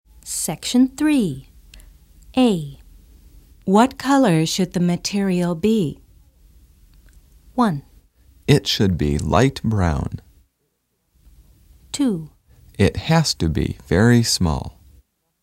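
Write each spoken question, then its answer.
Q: What color should the material be?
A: 1: It should be light brown.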